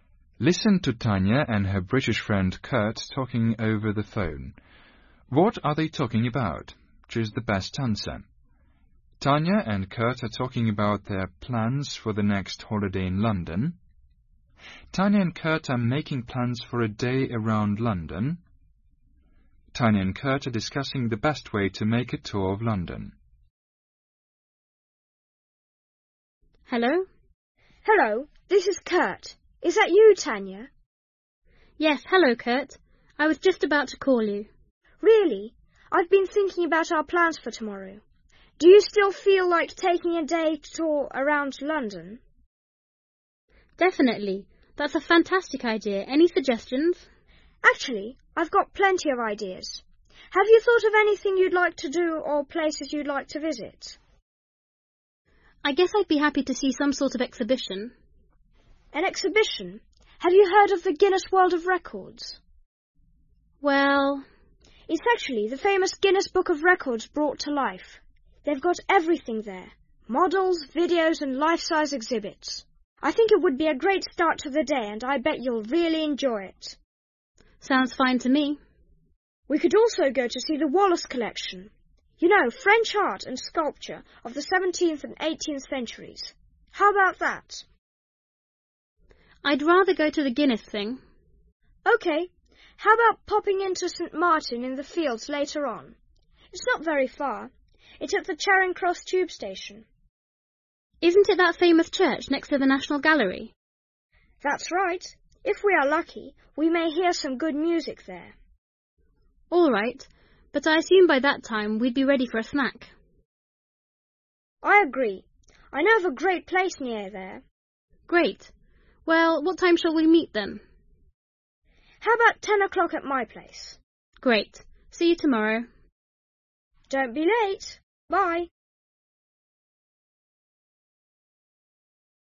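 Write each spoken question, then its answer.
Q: What are they talking about?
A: Tanya and Kurt are making plans for a day around London.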